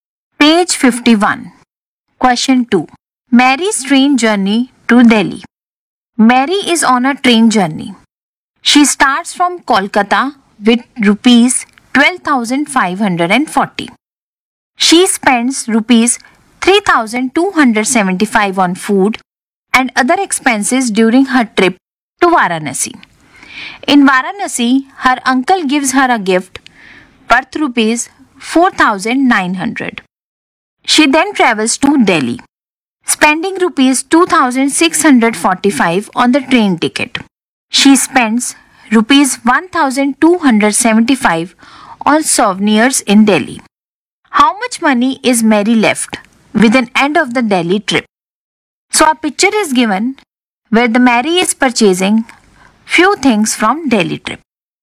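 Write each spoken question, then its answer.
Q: How much money is Mary left with an end of the Delhi trip?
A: Rupees 10,245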